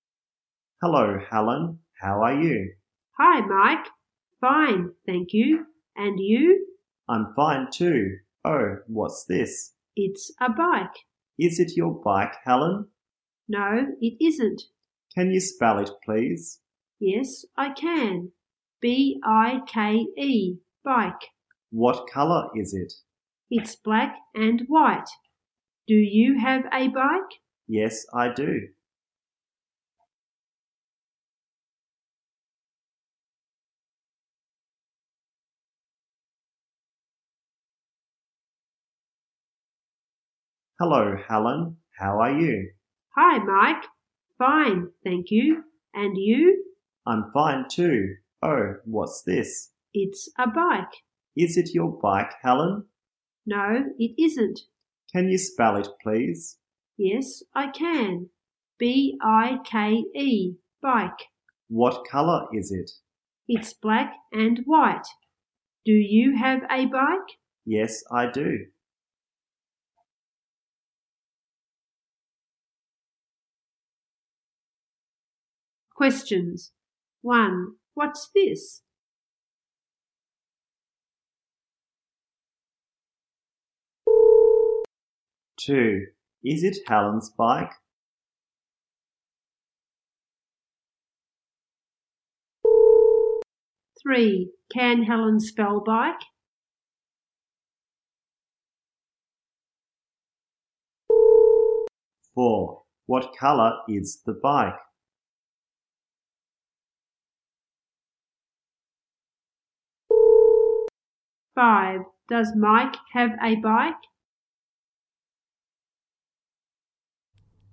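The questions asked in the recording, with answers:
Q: What's this?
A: A bike

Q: Is it Helen's bike?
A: No, it isn't

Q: Can Helen spell bike?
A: Yes, she can

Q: What colour is the bike?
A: Black and white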